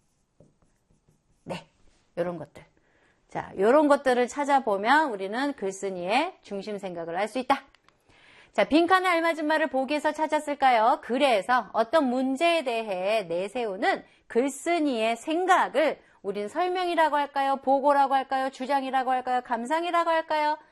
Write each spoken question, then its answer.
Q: 그래서 어떤 문제에 대해 내세우는 글쓴이의 생각을 우린 설명이라고 할까요? 보고라고 할까요? 주장이라고 할까요? 감상이라고 할까요?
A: 우리는 주장이라고 합니다.